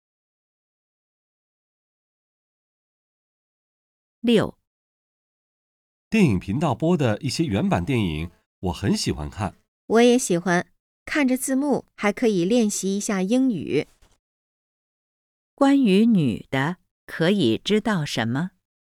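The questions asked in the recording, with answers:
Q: 关于女的,可以知道什么?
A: 她喜欢看原版电影,借字幕练习英语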